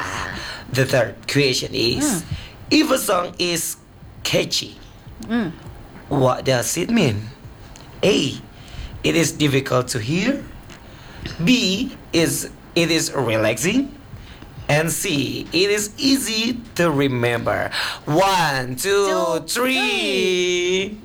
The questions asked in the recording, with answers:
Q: if a song is catchy, what does it mean?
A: It's C.